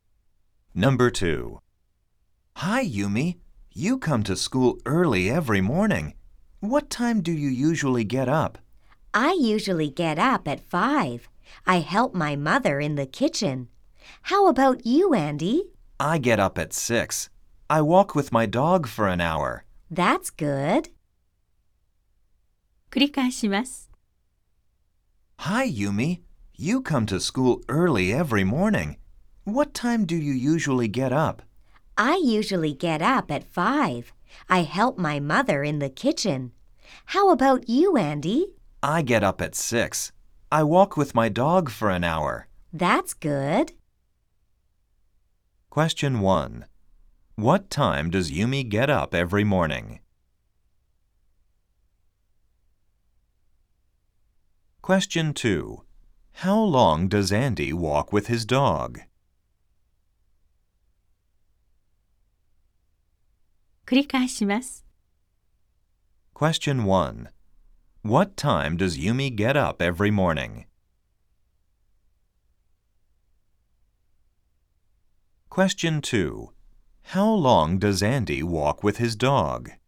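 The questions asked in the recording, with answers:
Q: What time does Yumi get up every morning?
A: She gets up at 5.

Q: How long does Andy walk with his dog?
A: For an hour.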